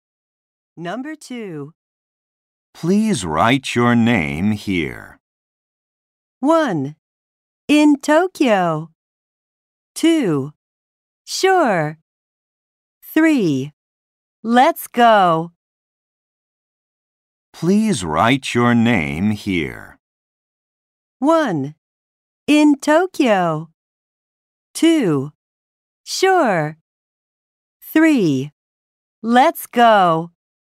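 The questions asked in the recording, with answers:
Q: Please write your name here.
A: 2: Sure.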